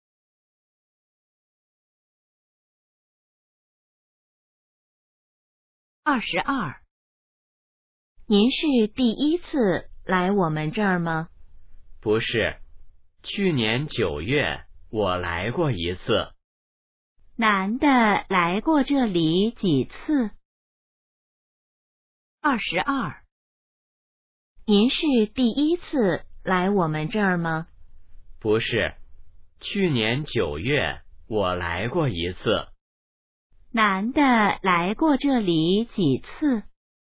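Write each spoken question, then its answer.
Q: 男的来过这里几次?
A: 一次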